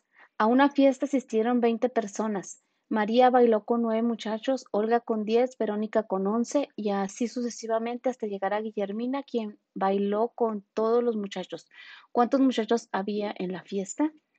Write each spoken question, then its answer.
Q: ¿Cuántos muchachos había en la fiesta?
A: Y la respuesta correcta es la de 14.